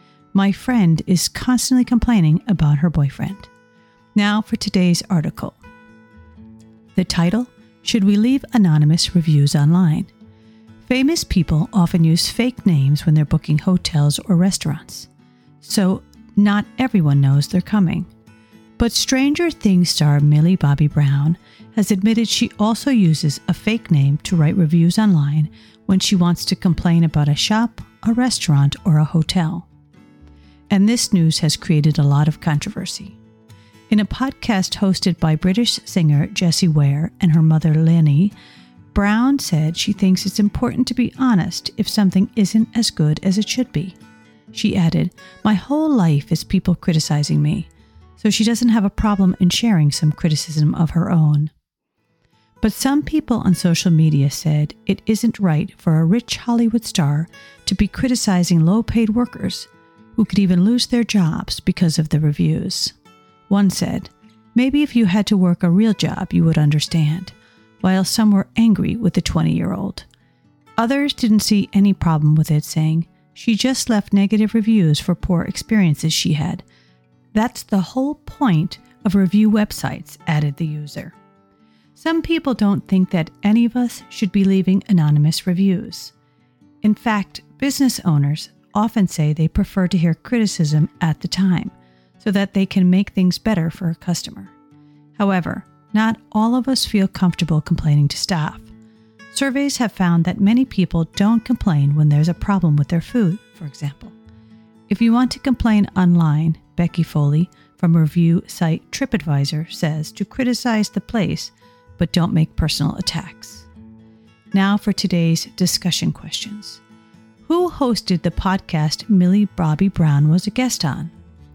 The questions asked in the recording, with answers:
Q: Who hosted the podcast Millie Bobby Brown was a guest on?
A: Answer, British singer Jessie Ware and her mother.